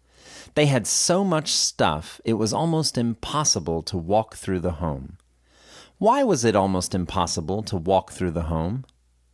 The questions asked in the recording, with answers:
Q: Why was it almost impossible to walk through the home?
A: It was almost impossible to walk through the home because they had so much stuff.